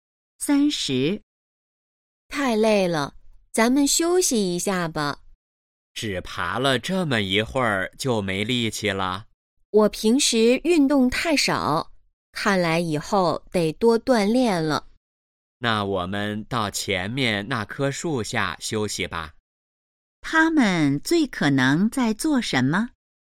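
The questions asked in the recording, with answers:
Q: 他们最可能在做什么?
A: 爬山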